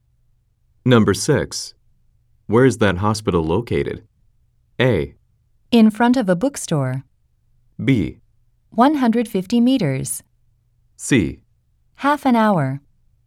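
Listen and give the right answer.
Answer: A: In front of a bookstore.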